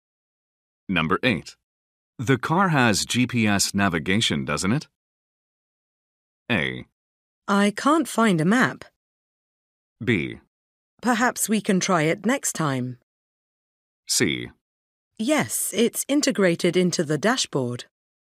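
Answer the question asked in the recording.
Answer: C: Yes, it's integrated into the dashboard.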